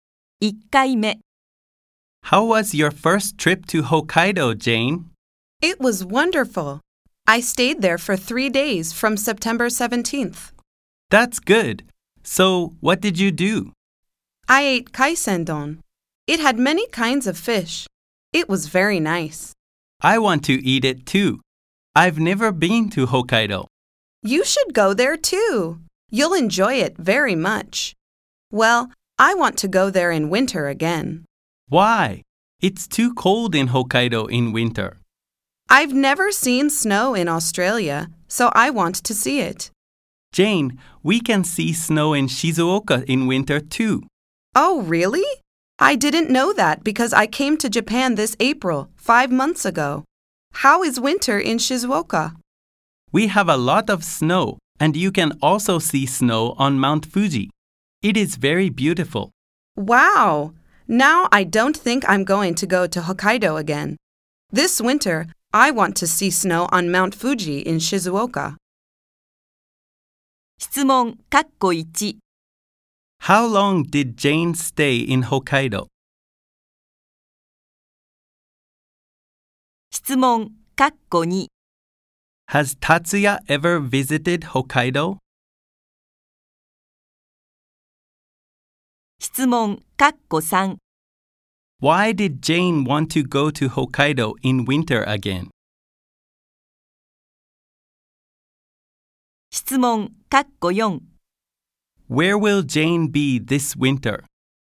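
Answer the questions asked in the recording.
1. For three days.
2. No, he hasn't.
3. Because she has never seen snow and wants to see it.
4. In Shizuoka (to see snow on Mount Fuji).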